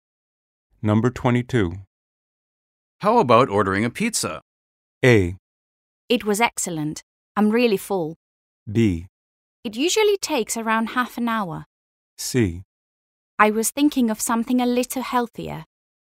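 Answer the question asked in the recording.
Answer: C: I was thinking of something a little healthier.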